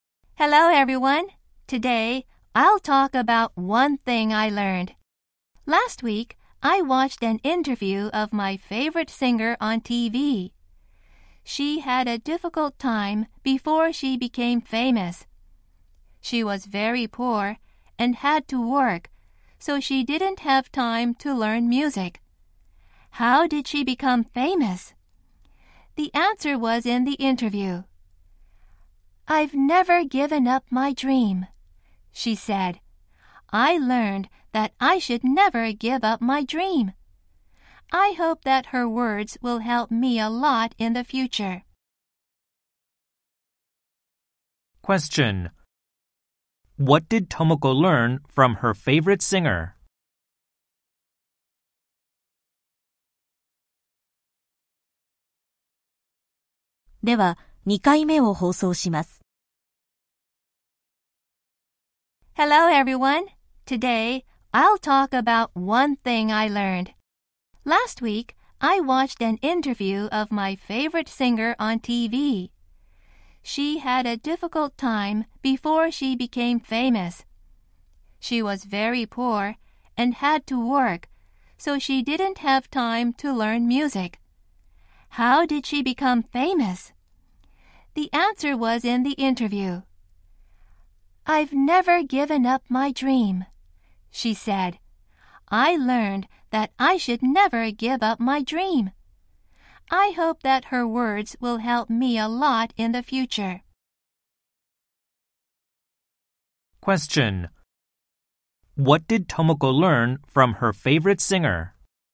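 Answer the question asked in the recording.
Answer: She should never give up her dream.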